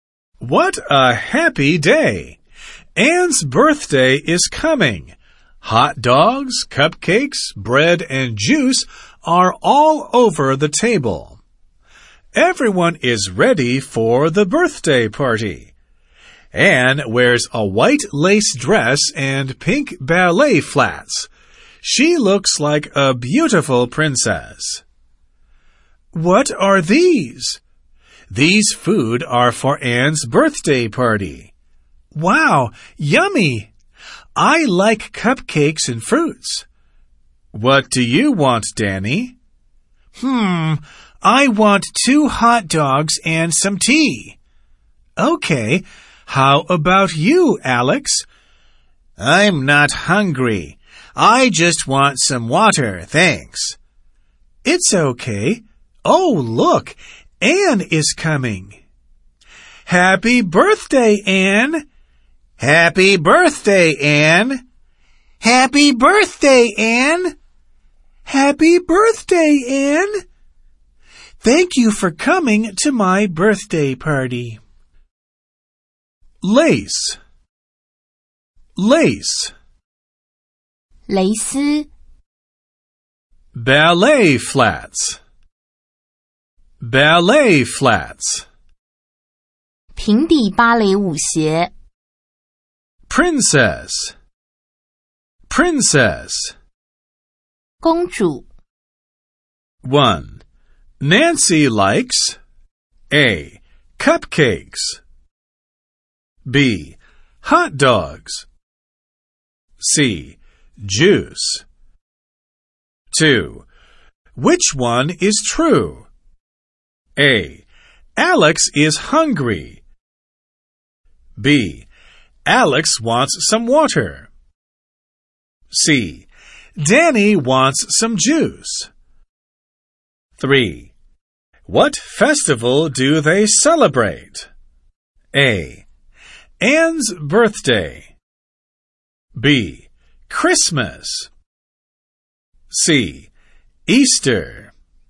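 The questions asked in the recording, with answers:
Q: Which one is true?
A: B: Alex wants some water.

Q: What festival do they celebrate?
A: A: Anne's birthday.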